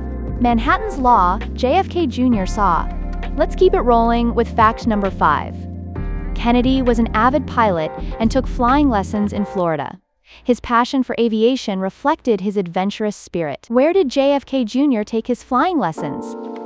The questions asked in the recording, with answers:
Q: Where did JFK Jr. take his flying lessons?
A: Correct answer, Florida.